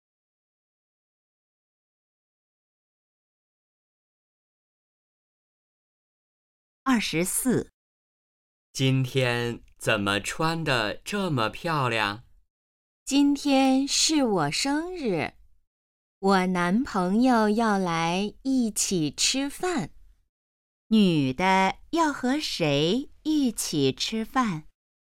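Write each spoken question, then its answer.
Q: 女的要和谁一起吃饭?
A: 男朋友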